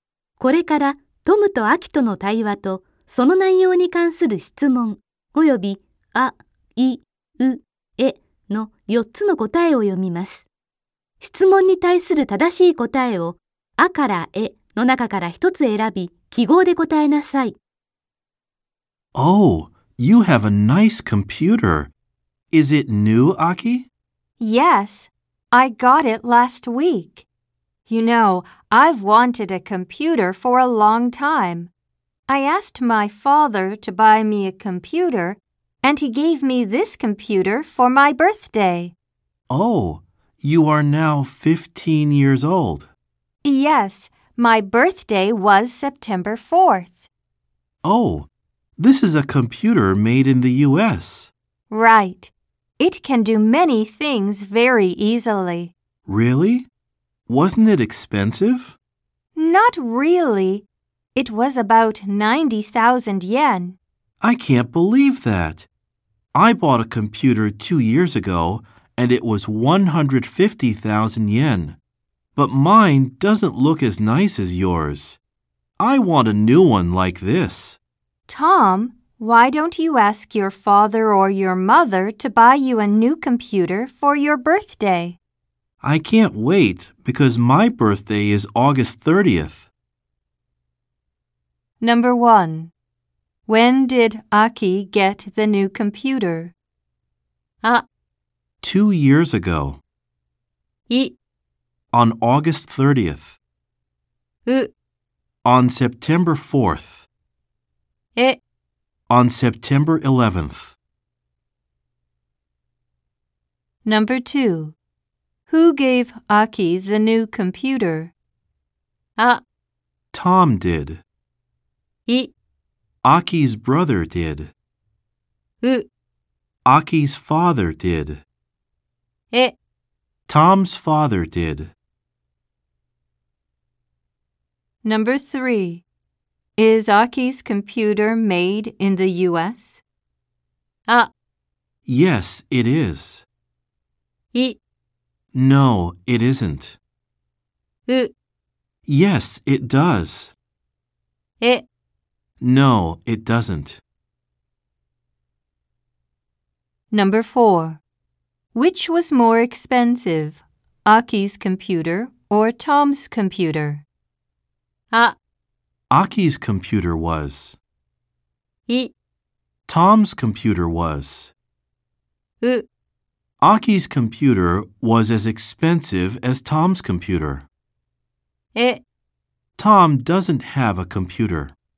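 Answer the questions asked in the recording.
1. う: On September 4th.
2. う: Aki's father did.
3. あ: Yes, it is.
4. い: Tom's computer was.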